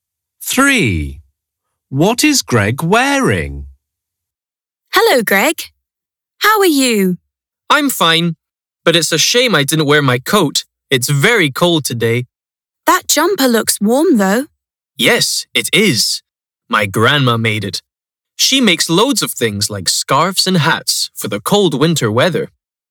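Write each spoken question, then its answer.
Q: What is Greg wearing?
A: A jumper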